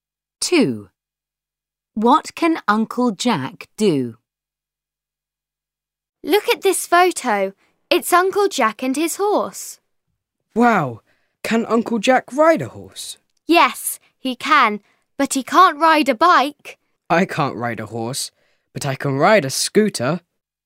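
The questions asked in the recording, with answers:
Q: What can Uncle Jack do?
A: ride a horse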